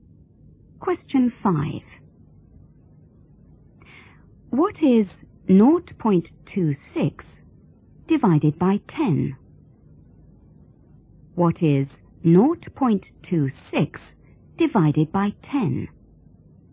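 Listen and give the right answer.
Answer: 0.026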